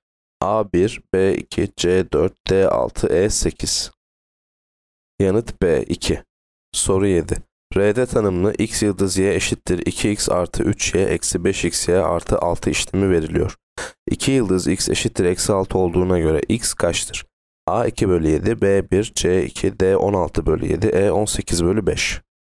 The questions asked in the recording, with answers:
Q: 2 yıldız x eşittir eksi 6 olduğuna göre x kaçtır?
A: Yanıt D 16 bölü 7.